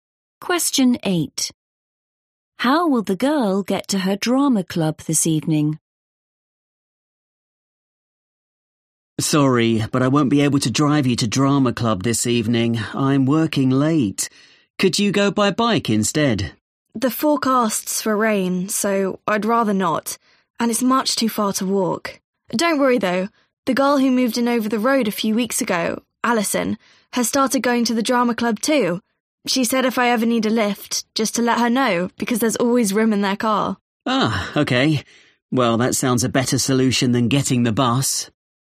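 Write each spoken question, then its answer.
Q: How will the girl get to her drama club this evening?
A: She'll get a lift in Alison's car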